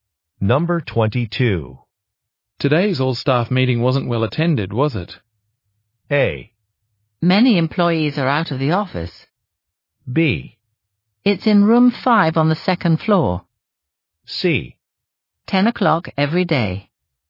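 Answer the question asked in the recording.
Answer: A: Many employees are out of the office.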